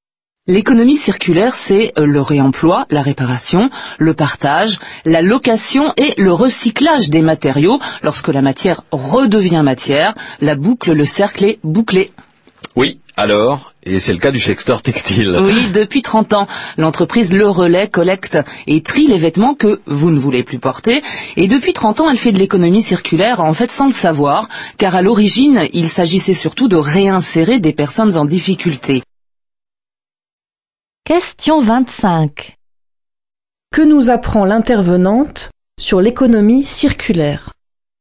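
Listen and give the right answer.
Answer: Elle se pratique depuis longtemps, parfois sans le savoir, comme au Relais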